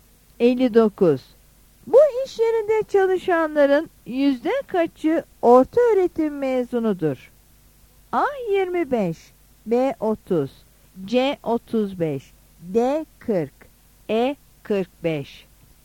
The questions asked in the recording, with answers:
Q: Bu iş yerinde çalışanların yüzde kaçı orta öğretim mezunudur?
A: Yanıt A'dır.